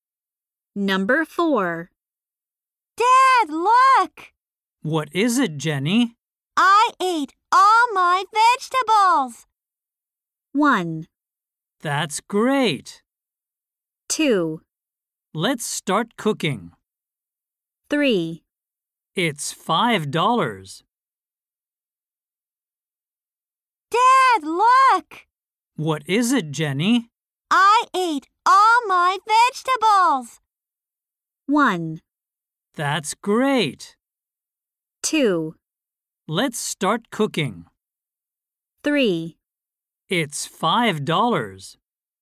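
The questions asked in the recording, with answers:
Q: I ate all my vegetables!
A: 1: That's great!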